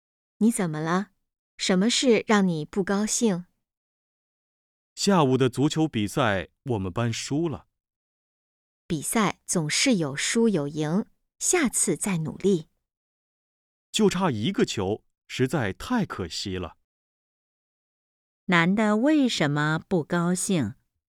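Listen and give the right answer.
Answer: 他们班足球比赛输了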